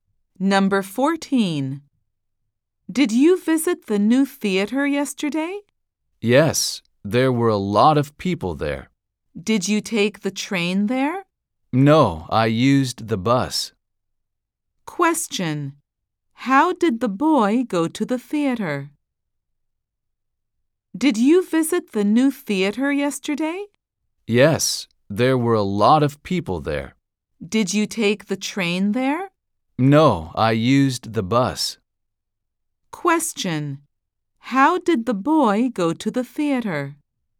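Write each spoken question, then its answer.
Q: How did the boy go to the theater?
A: By bus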